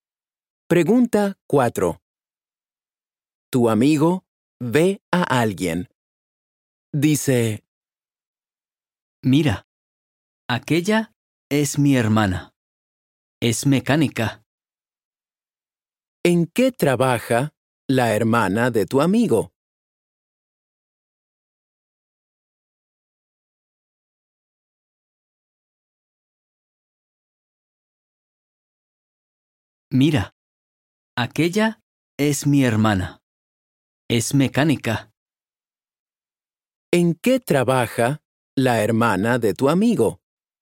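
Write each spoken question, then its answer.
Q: ¿En qué trabaja la hermana de tu amigo?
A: Es mecánica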